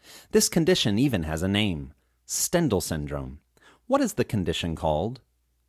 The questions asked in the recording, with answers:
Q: What is the condition called?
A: The condition is called Stendhal syndrome.